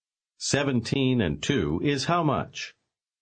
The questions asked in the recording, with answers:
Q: 17 and 2 is how much?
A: 19.